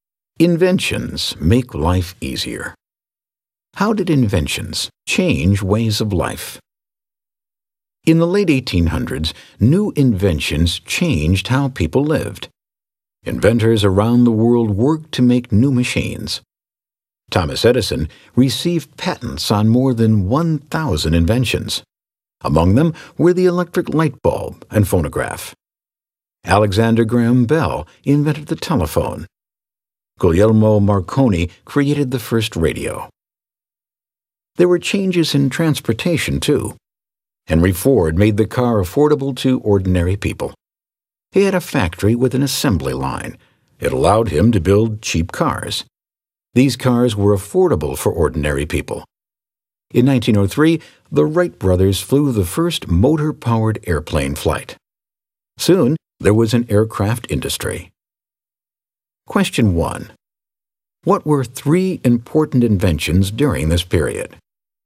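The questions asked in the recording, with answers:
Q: What were three important inventions during this period?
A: The electric light bulb, the telephone, and the radio (also the phonograph, affordable car, airplane)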